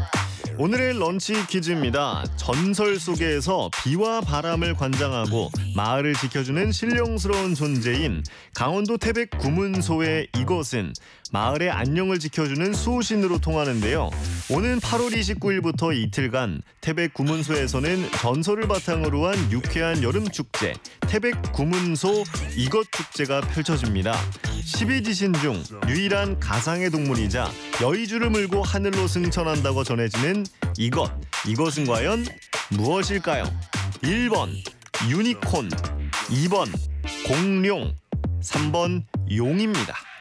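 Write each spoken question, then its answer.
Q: 이것은 과연 무엇일까요? 1번 유니콘, 2번 공룡, 3번 용입니다.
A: 3: 용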